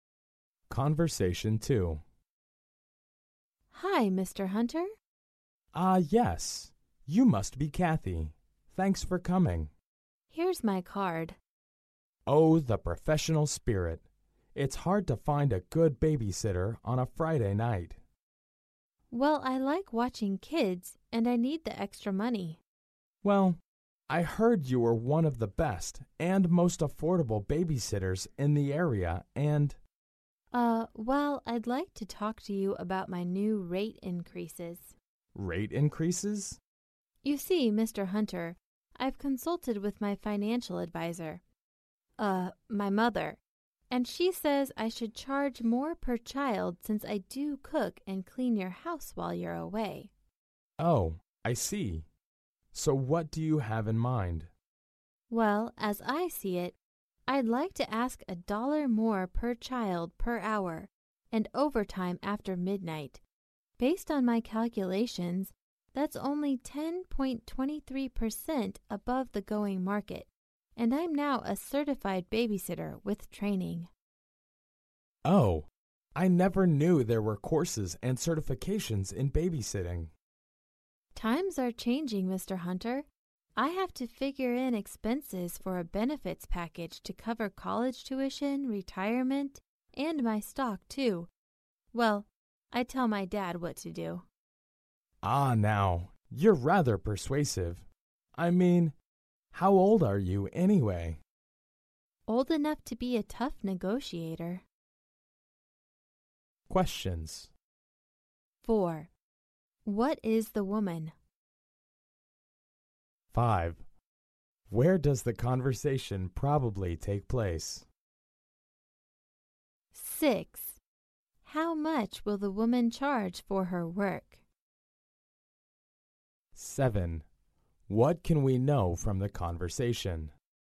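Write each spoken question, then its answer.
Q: What is the woman?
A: A babysitter

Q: How much will the woman charge for her work?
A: A dollar more per child per hour, plus overtime after midnight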